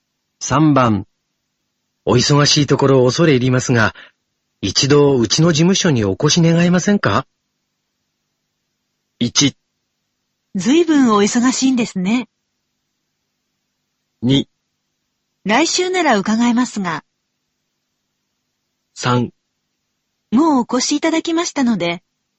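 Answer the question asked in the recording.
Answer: 2: 来週なら伺えますが。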